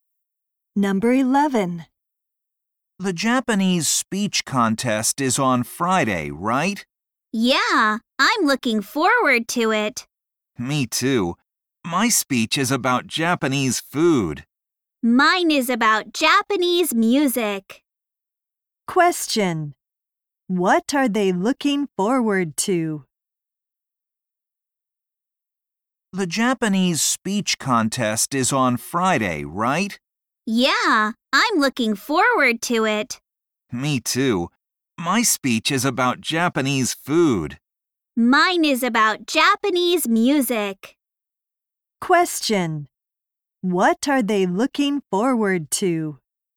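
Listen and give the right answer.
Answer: The Japanese speech contest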